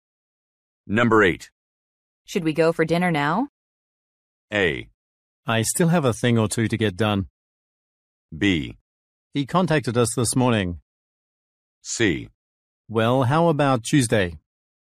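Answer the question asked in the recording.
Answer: A: I still have a thing or two to get done.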